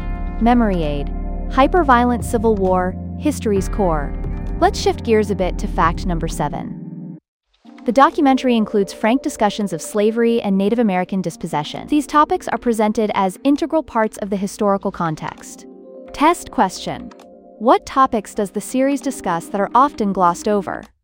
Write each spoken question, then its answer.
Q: What topics does the series discuss that are often glossed over?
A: Slavery and Native American dispossession.